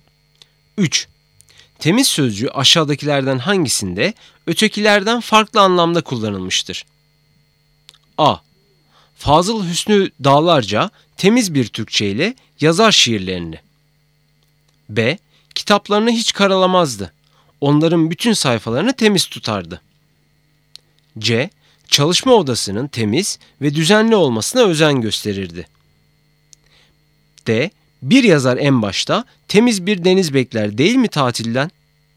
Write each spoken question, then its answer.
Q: Temiz sözcüğü aşağıdakilerden hangisinde ötekilerden farklı anlamda kullanılmıştır?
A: Doğru cevap A, Fazıl Hüsnü Dağlarca temiz bir Türkçe ile yazar şiirlerini.